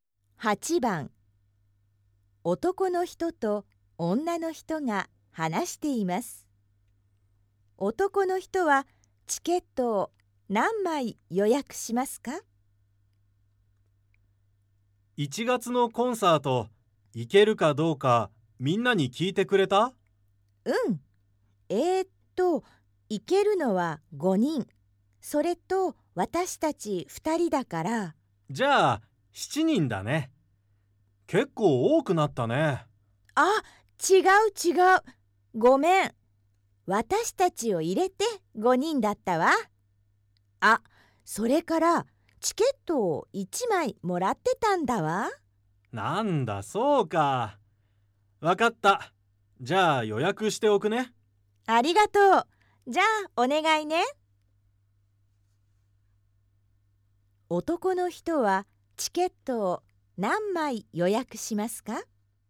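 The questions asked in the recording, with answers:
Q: 男の人はチケットを何枚予約しますか?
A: 4枚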